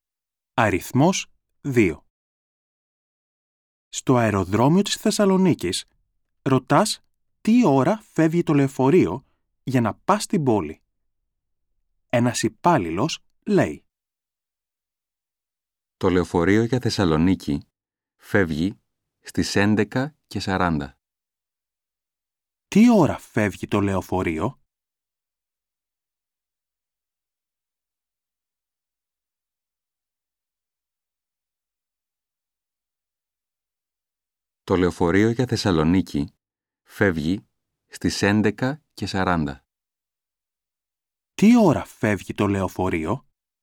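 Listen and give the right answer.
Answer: Στις 11:40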